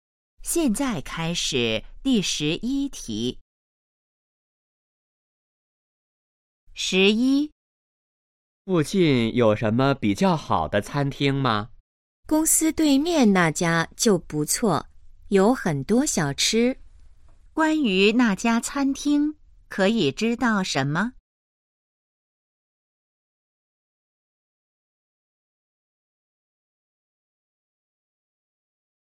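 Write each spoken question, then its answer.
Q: 关于那家餐厅,可以知道什么?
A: 在公司对面,有很多小吃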